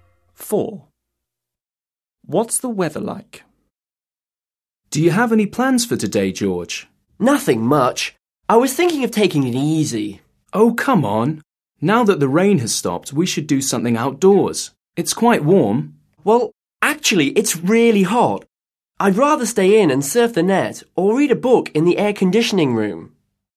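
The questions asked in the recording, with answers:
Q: What's the weather like?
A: Really hot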